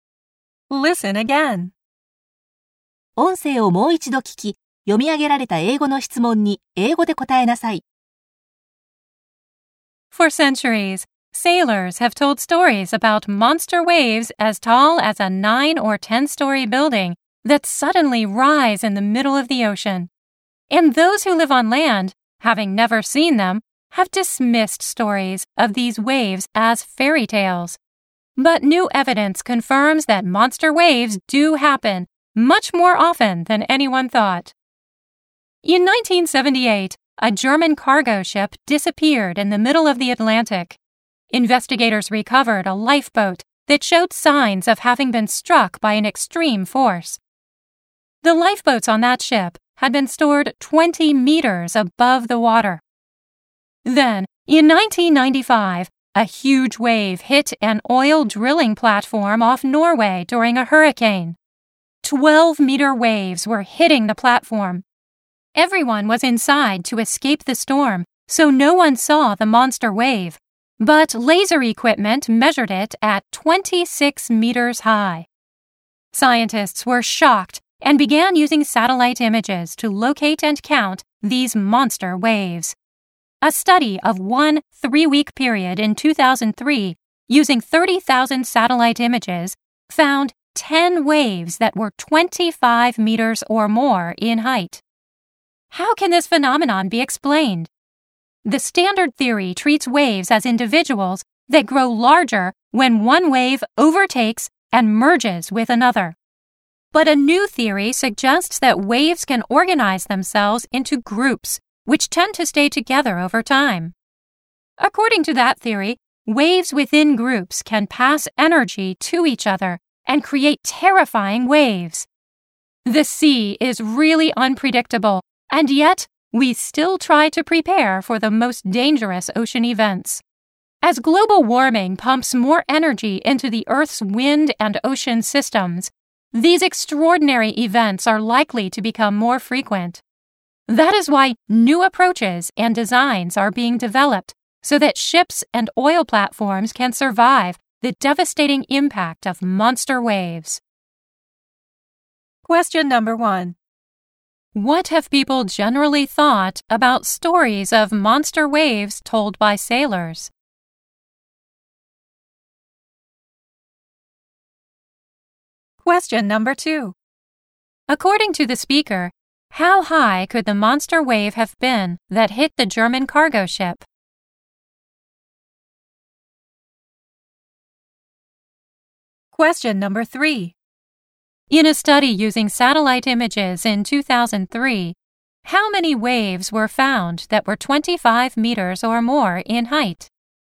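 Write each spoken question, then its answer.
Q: What have people generally thought about stories of monster waves told by sailors?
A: They thought they were fairy tales.

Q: According to the speaker,How high could the monster wave have been that hit the German cargo ship?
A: About 20 meters or more.

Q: In a study using satellite images in 2003, how many waves were found that were 25 meters or more in height?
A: 10 waves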